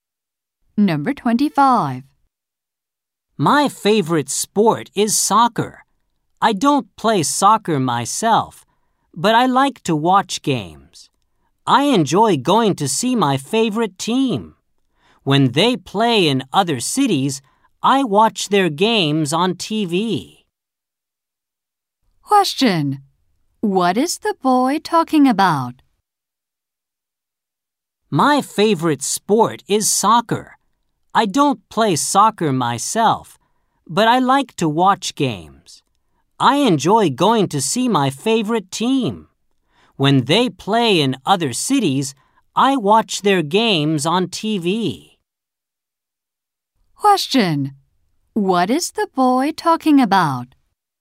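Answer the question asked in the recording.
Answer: Watching soccer games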